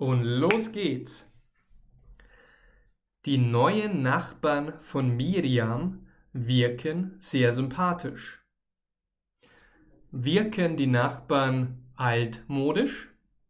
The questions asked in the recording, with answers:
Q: Wirken die Nachbarn altmodisch?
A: Nein, Sie wirken nicht altmodisch.